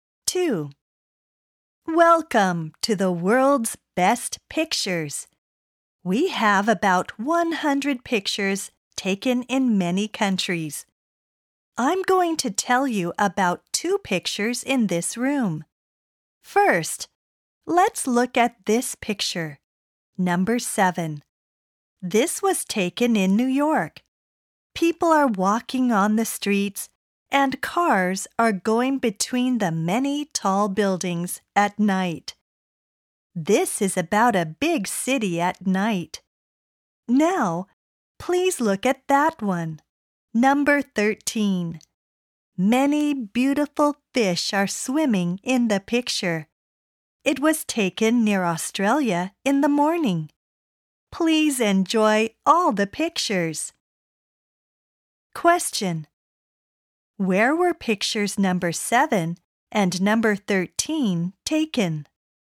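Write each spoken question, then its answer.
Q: Where were pictures number 7 and number 13 taken?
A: Number 7 in New York, number 13 near Australia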